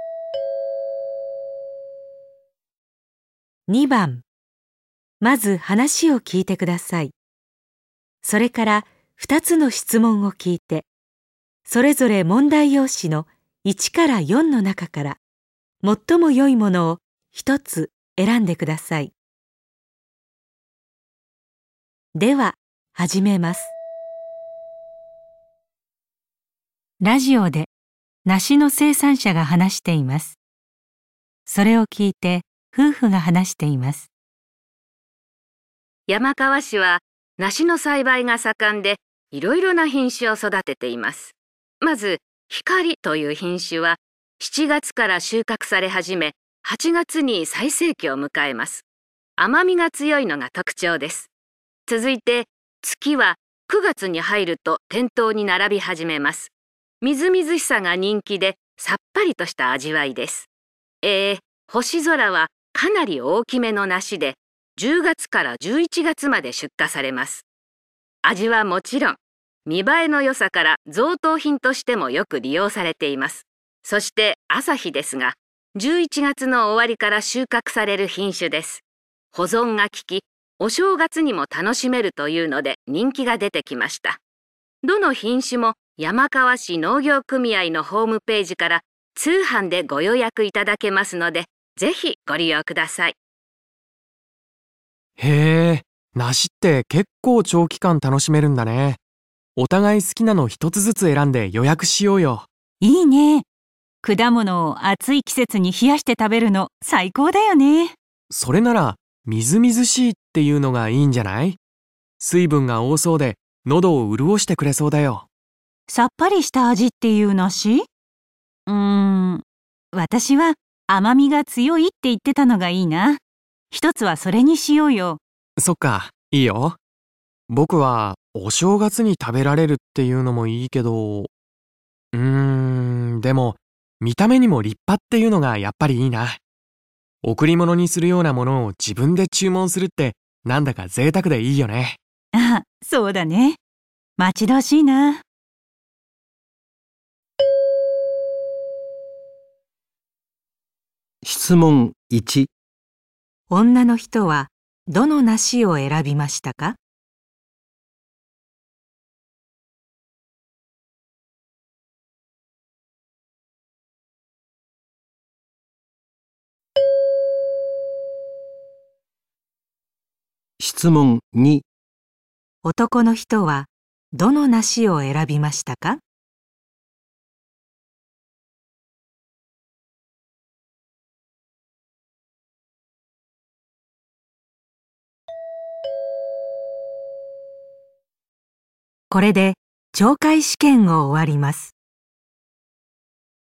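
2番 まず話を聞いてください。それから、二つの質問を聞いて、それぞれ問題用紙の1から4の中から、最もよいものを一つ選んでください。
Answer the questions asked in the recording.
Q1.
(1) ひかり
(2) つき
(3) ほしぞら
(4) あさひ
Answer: (1) ひかり
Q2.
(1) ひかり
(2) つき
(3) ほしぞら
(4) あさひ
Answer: (3) ほしぞら

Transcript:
男 : へぇー、 梨ってけっこう長期間楽しめるんだね。 お互い好きなの一つずつ選んで予約しようよ。
女2:いいね。 果物を暑い季節に冷やして食べるの最高だよね。
男:それなら「みずみずしい」って言うのがいいんじゃない?水分が多そうで喉を潤してくれそうだよ。
女2:さっぱりした味っていう梨?うーん、 私は甘みが強いって言ってたのがいいな。 一つはそれにしようよ。
男: そっか、いいよ。 僕はお正月に食べられるっていうのもいいけど。うーん、でも見た目にも立派っていうのが やっぱりいいな。贈り物にするようなものを自分で注文するって何だか贅沢でいいよね。
女2:あ、そうだね。 待ち遠しいなあ。

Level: N1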